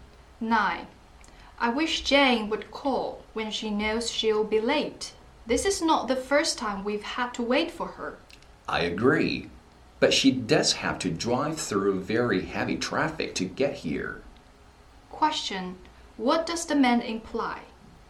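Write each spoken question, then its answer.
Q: Question. What does the man imply?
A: Jane's lateness is understandable because of heavy traffic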